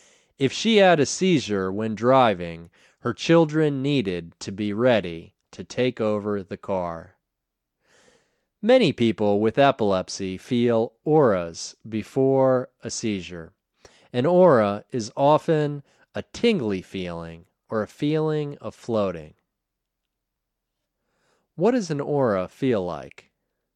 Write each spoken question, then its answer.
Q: What does an aura feel like?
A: An aura is often a tingly feeling or a feeling of floating.